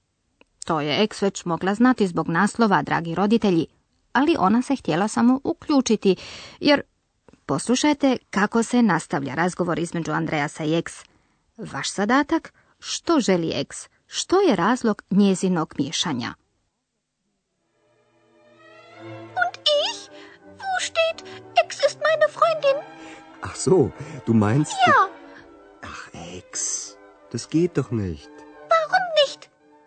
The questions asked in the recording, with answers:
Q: Vaš zadatak? Što želi ex?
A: Ek smatra da bi Andreas trebao i o njoj pisati i pita je li napisao da je ona Andreasova prijateljica, Freundin.